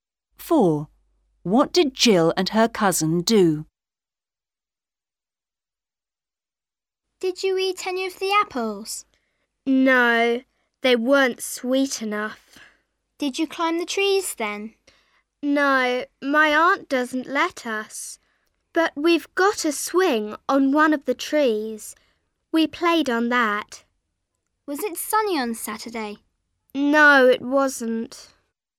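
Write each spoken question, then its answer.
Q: What did Jill and her cousin do?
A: They played on a swing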